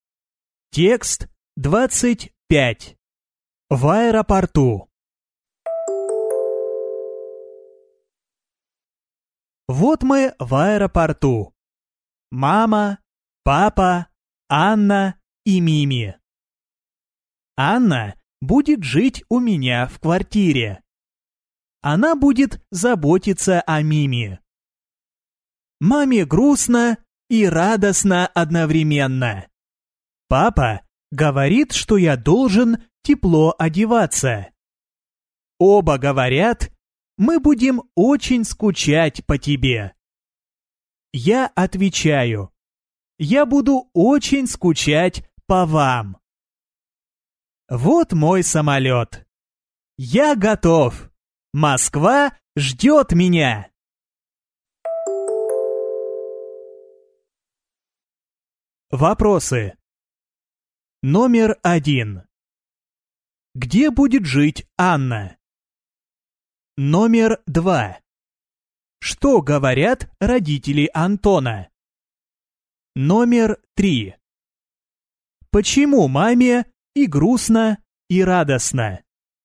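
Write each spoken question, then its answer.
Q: Где будет жить Анна?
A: У него (рассказчика) в квартире

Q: Что говорят родители Антона?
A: Мы будем очень скучать по тебе; папа говорит, что он должен тепло одеваться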